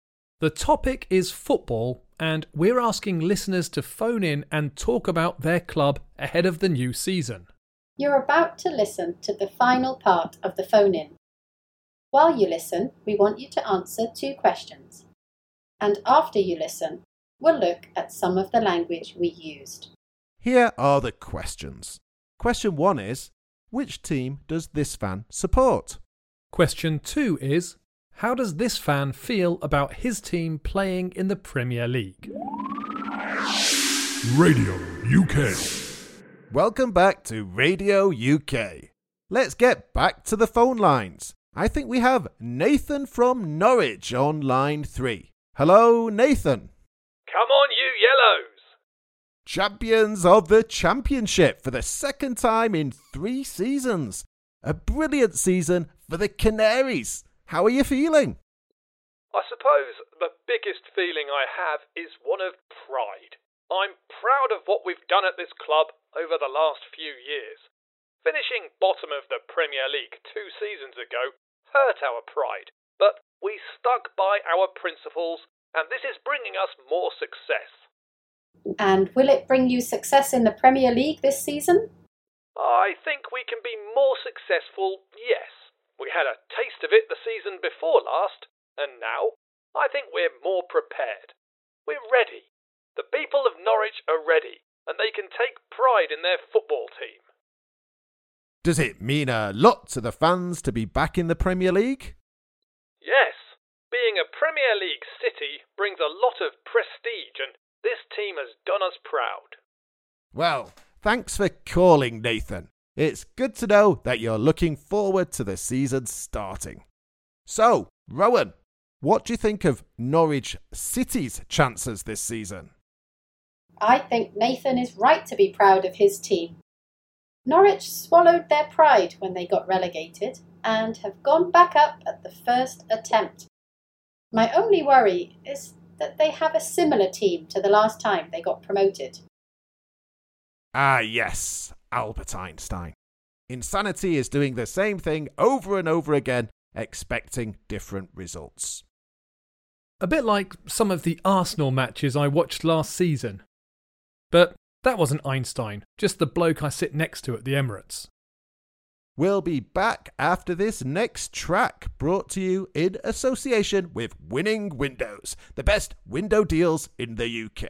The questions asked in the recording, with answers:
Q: which team does this fan support?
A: The answer is Norwich City.

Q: how does this fan feel about his team playing in the Premier League?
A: Well, I'd say Nathan was proud.